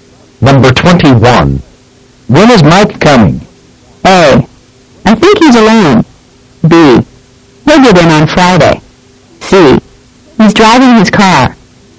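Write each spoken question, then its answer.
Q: When is Mike coming?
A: B: He'll get in on Friday.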